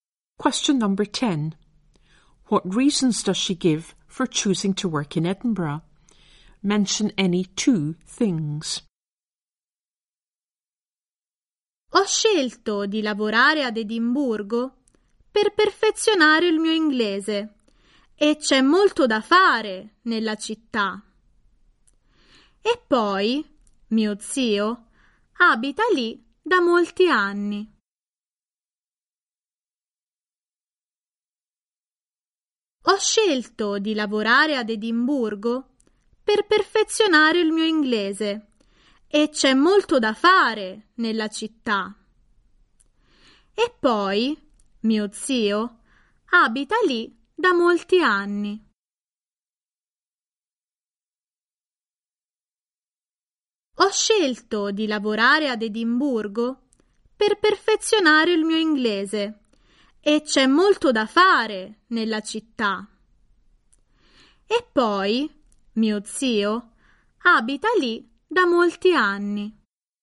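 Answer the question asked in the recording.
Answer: To improve her English, lots to do in the city, her uncle lives there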